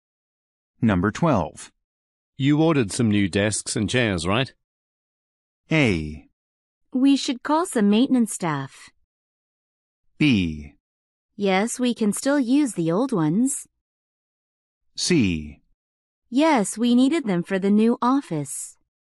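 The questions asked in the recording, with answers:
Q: You ordered some new desks and chairs, right?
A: C: Yes, we needed them for the new office.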